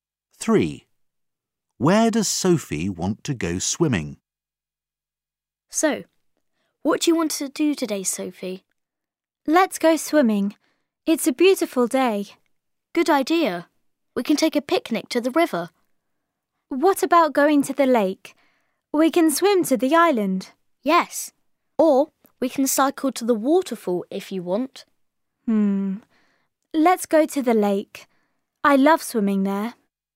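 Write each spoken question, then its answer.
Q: Where does Sophie want to go swimming?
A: the lake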